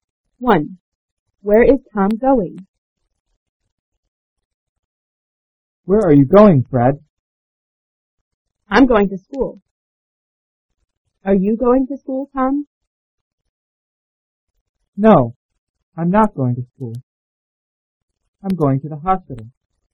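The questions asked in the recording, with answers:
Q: Where is Tom going?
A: To the hospital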